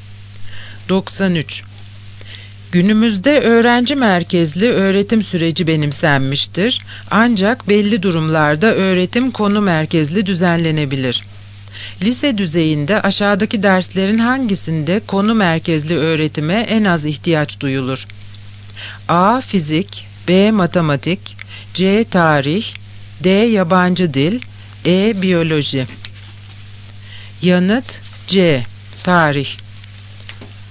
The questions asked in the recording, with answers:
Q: Lise düzeyinde aşağıdaki derslerin hangisinde konu merkezli öğretime en az ihtiyaç duyulur?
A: Yanıt C. Tarih.